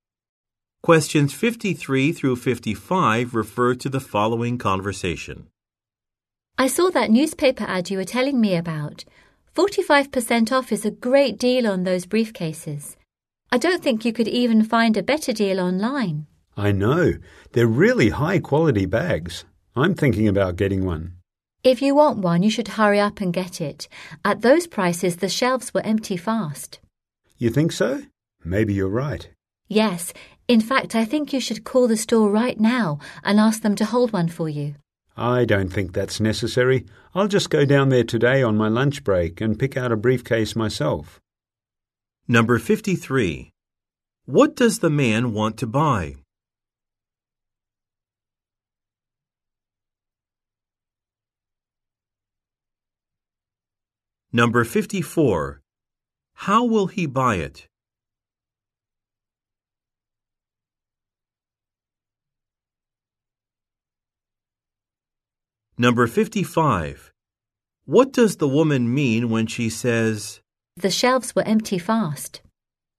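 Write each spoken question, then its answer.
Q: What does the man want to buy?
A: A briefcase

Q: How will he buy it?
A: In person at the store on his lunch break

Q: What does the woman mean when she says,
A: The briefcases will sell out quickly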